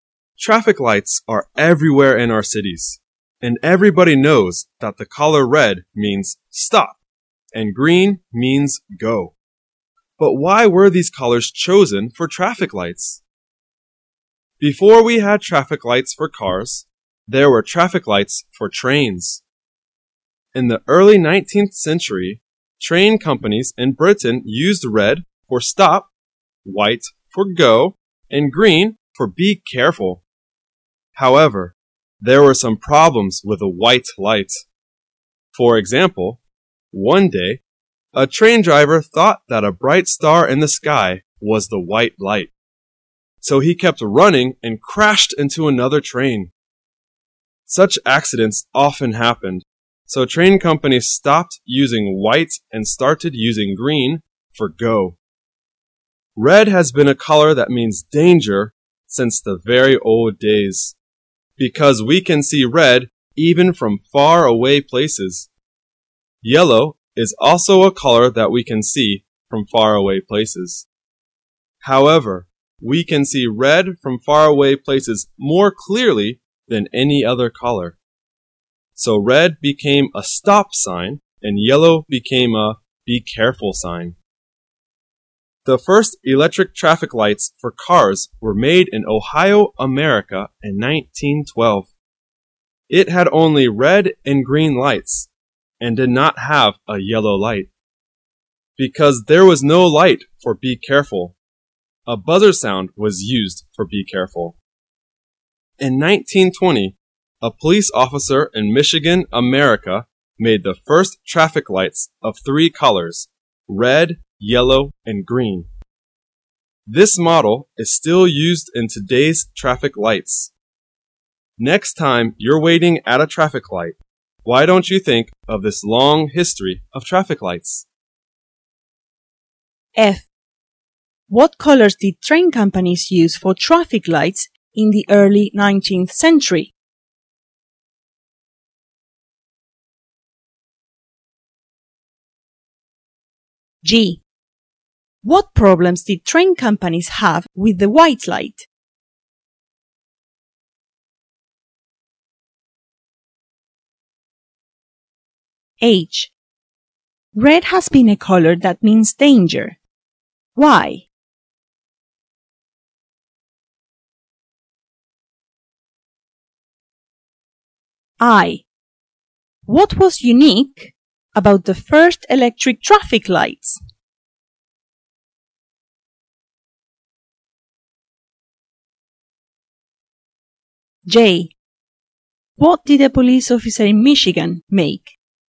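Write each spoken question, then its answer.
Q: What colors did train companies use for traffic lights in the early 19th century?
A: Red for stop, white for go, and green for be careful

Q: What problems did train companies have with the white light?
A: Drivers mistook bright stars for the white light and crashed into other trains

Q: Red has been a color that means danger. Why?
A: Because we can see red even from far away places

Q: What was unique about the first electric traffic lights?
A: They had only red and green lights, with a buzzer for be careful

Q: What did a police officer in Michigan make?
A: The first three-color traffic lights (red, yellow, green)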